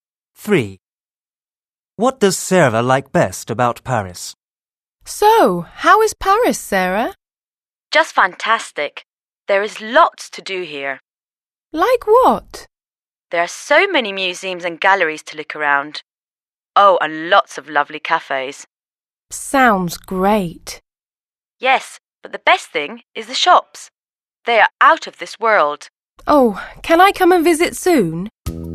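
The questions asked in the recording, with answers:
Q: What does Sarah like best about Paris?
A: The shops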